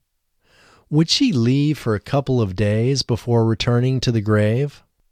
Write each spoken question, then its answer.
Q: Would she leave for a couple of days before returning to the grave?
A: No, she wouldn't leave for a couple of days before returning to the grave.